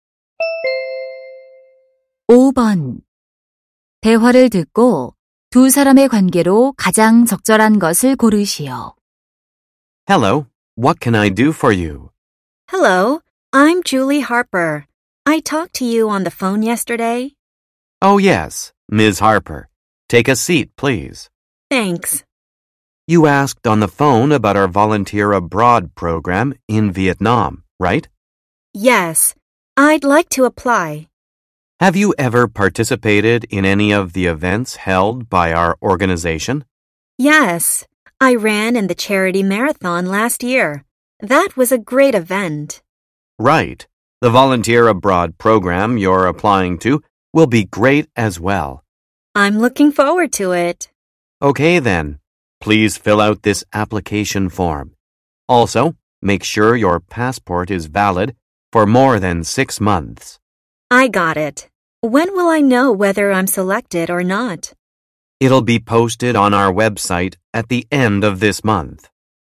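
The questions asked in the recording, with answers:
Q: 대화를 듣고 두 사람의 관계로 가장 적절한 것을 고르시오.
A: 해외 봉사 프로그램 지원자와 단체 직원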